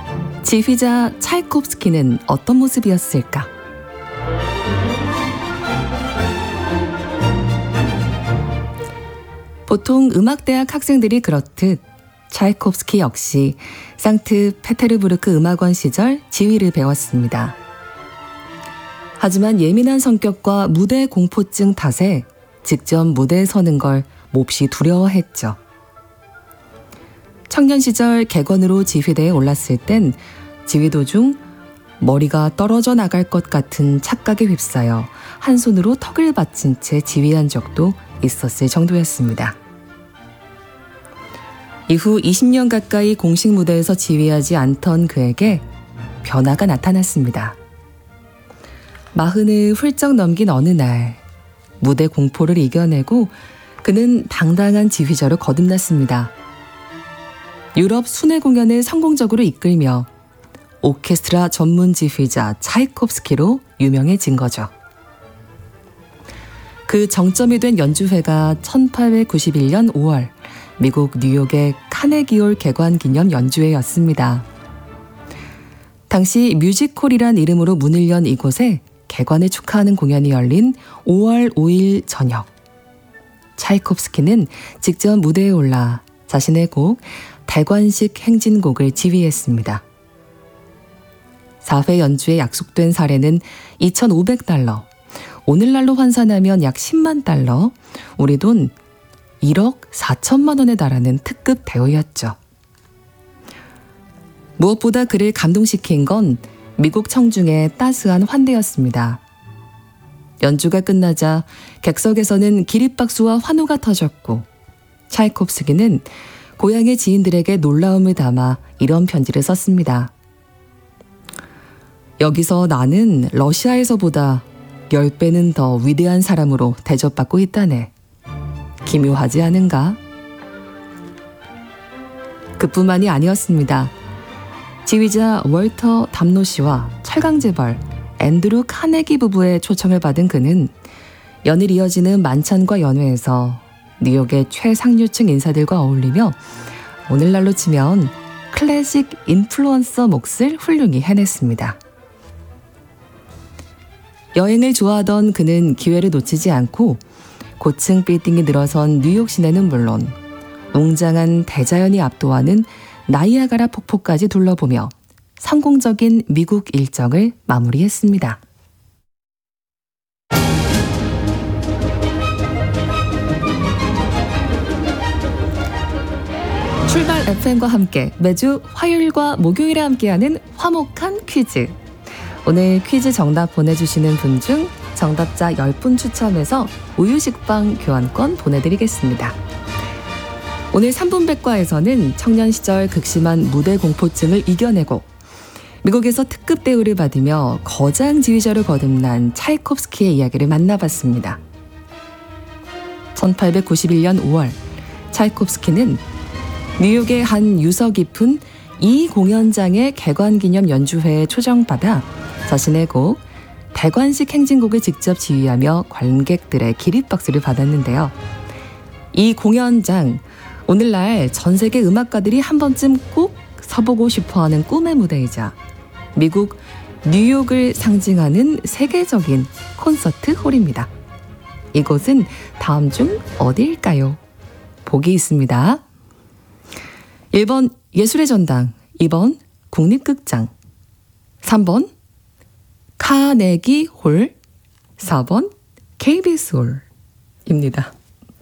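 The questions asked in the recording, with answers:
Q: 이곳은 다음 중 어디일까요?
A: 3번: 카네기 홀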